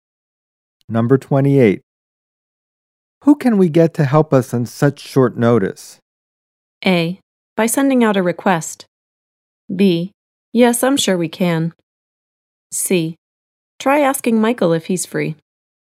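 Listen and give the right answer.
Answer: C: Try asking Michael if he's free.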